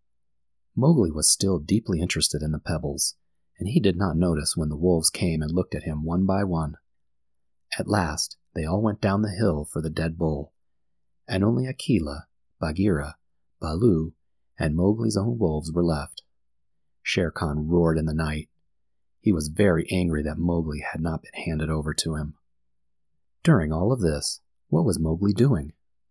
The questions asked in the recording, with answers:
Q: During all of this, what was Mowgli doing?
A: Mowgli was still playing with the pebbles on the ground in front of the wolf pack.